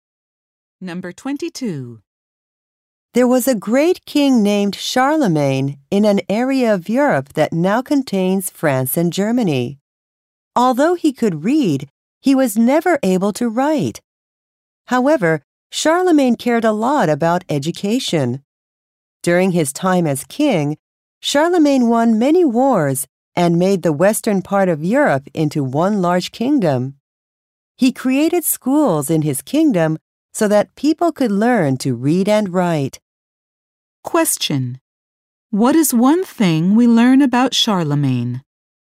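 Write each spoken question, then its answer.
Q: What is one thing we learn about Charlemagne?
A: He could not write but created schools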